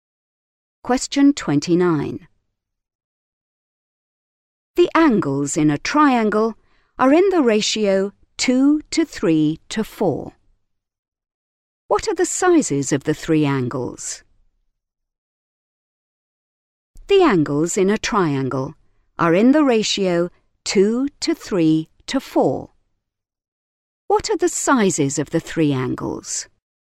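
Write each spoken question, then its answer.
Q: What are the sizes of the three angles?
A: 40°, 60°, 80°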